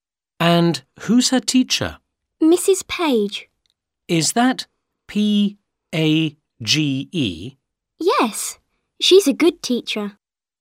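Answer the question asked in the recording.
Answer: Mrs. Page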